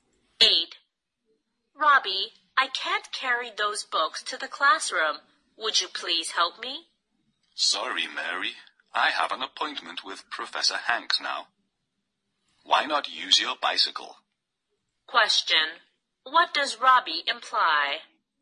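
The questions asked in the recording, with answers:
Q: What does Robbie imply?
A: He can't help; Mary should carry the books on her bicycle.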